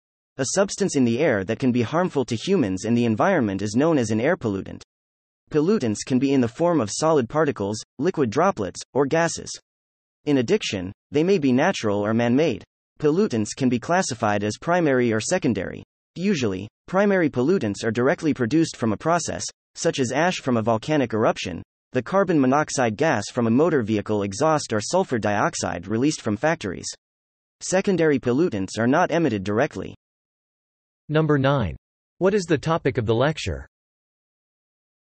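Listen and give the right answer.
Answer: Air pollutants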